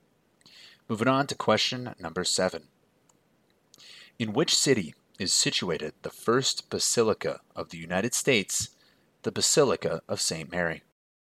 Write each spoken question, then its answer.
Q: In which city is situated the first basilica of the United States, the Basilica of St. Mary?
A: And that first basilica of the US of A is located in Minneapolis, Minnesota.